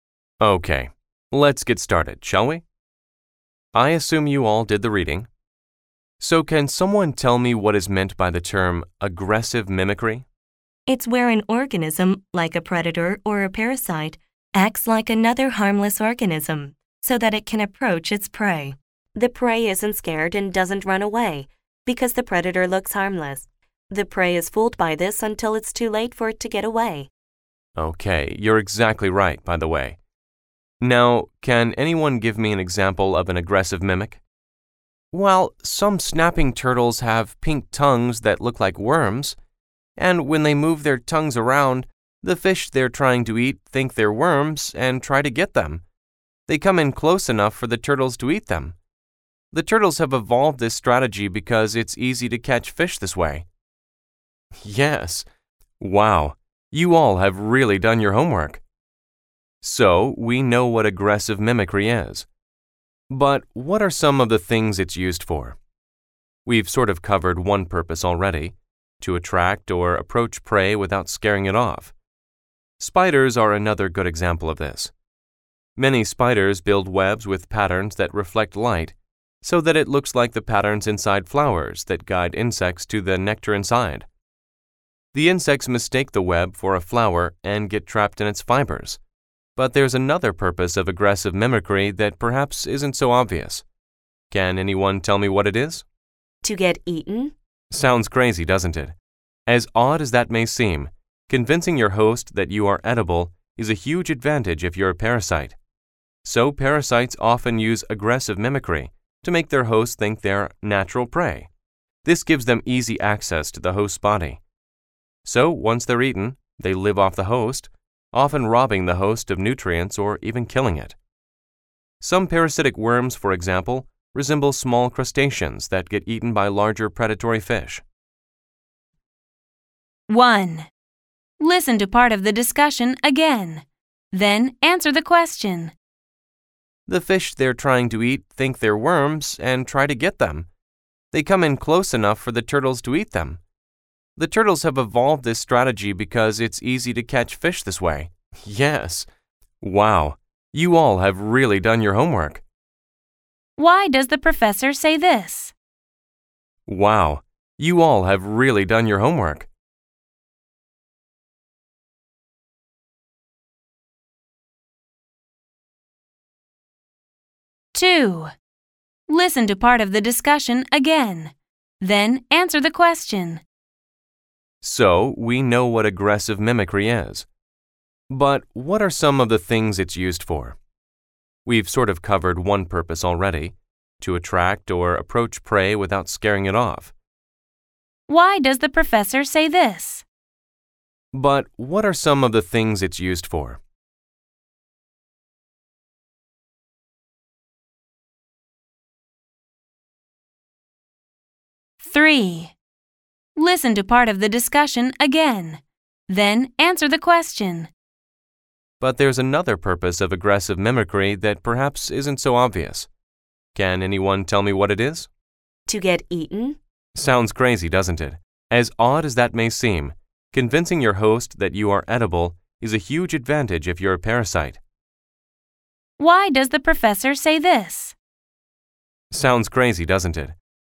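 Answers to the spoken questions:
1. To praise the students for preparing well and giving correct answers
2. To introduce the next topic: the purposes of aggressive mimicry
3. To admit that the idea of wanting to get eaten seems strange, though it is true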